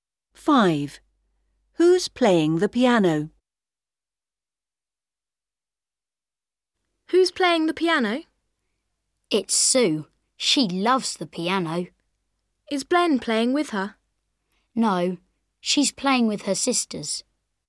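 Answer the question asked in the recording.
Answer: Sue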